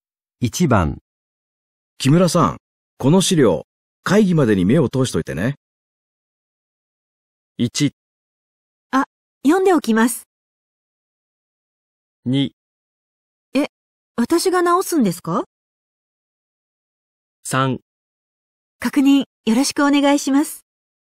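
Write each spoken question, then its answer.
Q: 木村さん、この資料、会議までに目を通しといてね。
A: 1: あ、読んでおきます。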